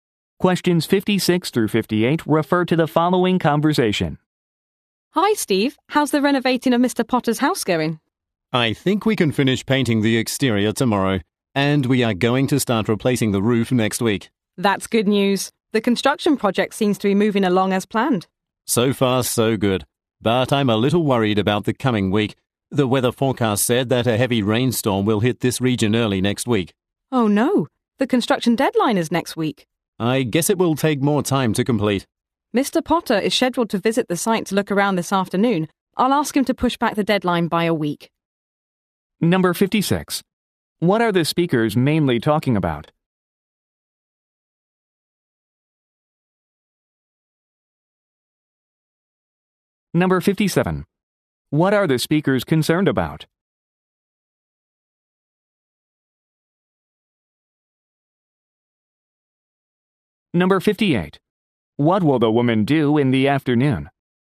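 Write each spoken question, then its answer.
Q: What are the speakers mainly talking about?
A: Renovating Mr. Potter's house

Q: What are the speakers concerned about?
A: A heavy rainstorm delaying the work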